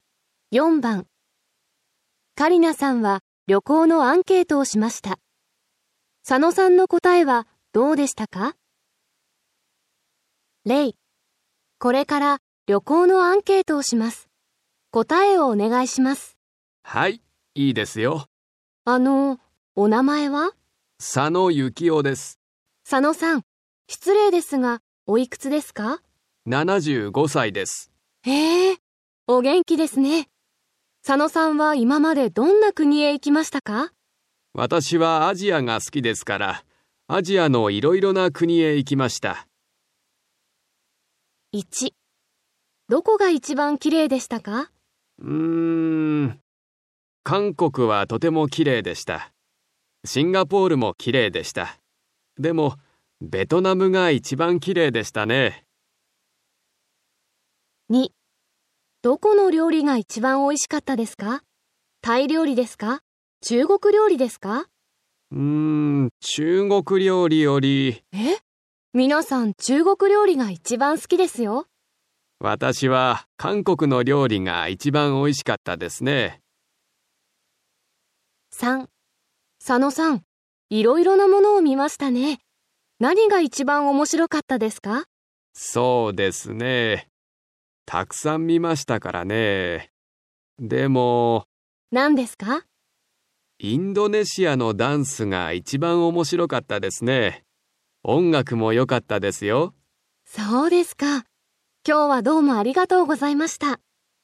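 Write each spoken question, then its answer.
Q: どこが一番綺麗でしたか?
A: ベトナム

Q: どこの料理が一番美味しかったですか?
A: 韓国の料理

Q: 何が一番面白かったですか?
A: インドネシアのダンス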